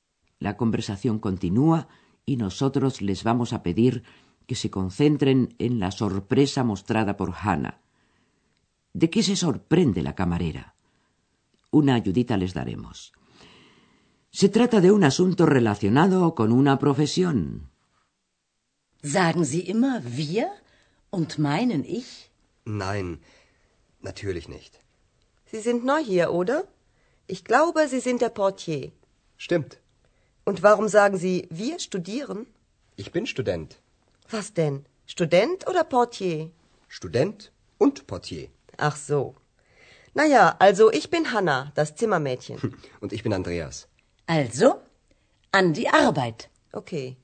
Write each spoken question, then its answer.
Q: ¿De qué se sorprende la camarera?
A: Hannah se asombra de que Andreas diga que es estudiante, siendo así que muy poco antes le asegura que es el recepcionista del Hotel Europa.